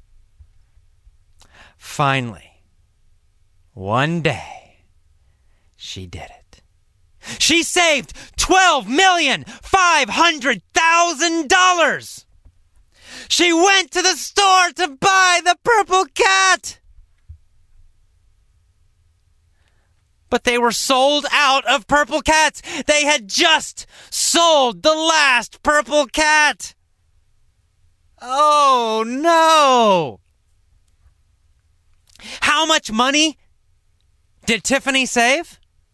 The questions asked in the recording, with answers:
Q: How much money did Tiffany save?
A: Tiffany saved $12,500,000.